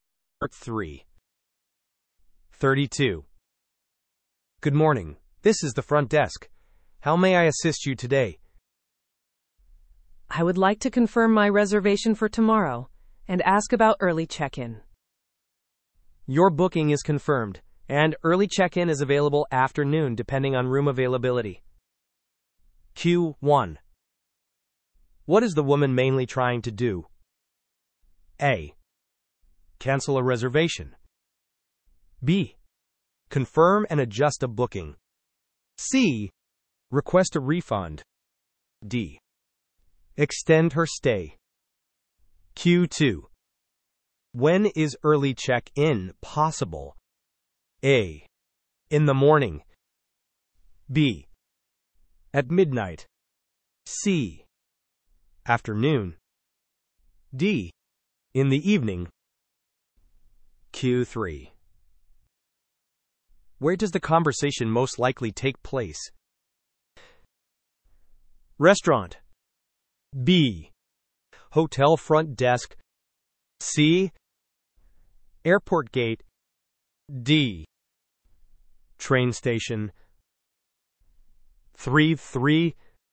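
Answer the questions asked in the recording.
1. B: Confirm and adjust a booking.
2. C: Afternoon.
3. B: Hotel front desk.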